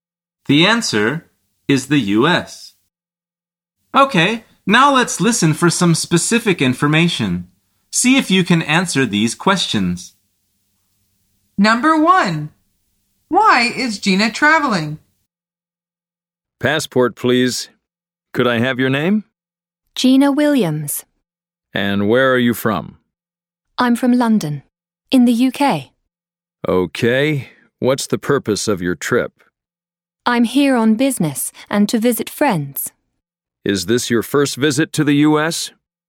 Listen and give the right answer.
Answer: The answer is for business and to visit friends.